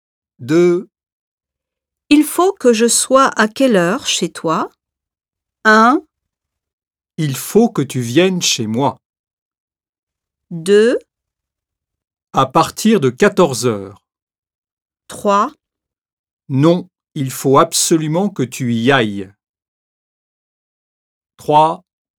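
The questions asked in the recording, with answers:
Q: Il faut que je sois à quelle heure chez toi?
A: 2: À partir de 14 heures.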